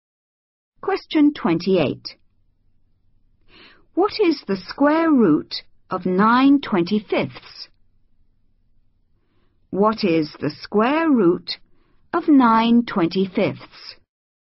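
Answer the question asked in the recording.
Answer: 3/5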